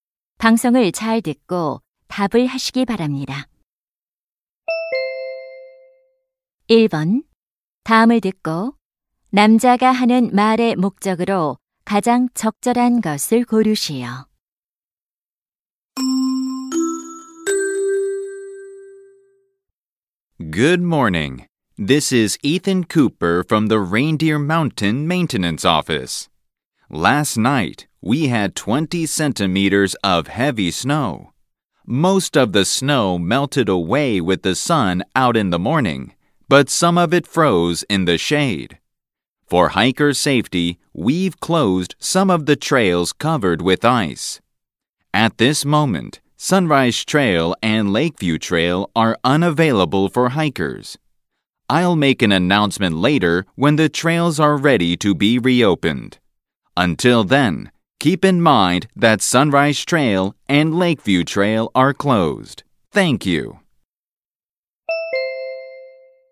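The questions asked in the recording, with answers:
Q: 다음을 듣고 남자가 하는 말의 목적으로 가장 적절한 것을 고르시오.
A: 빙판으로 인한 등산로(Sunrise Trail, Lakeview Trail) 폐쇄를 알리려고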